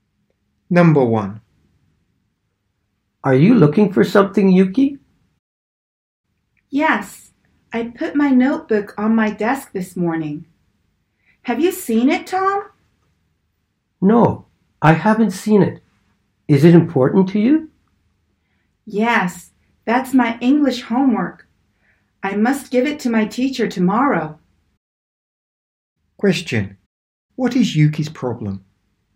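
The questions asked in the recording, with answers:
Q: Question. What is Yuki's problem?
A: She can't find her notebook with her English homework.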